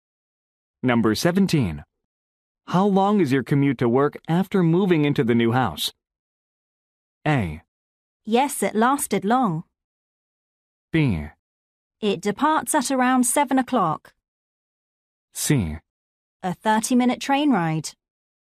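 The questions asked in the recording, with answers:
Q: How long is your commute to work after moving into the new house?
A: C: A 30-minute train ride.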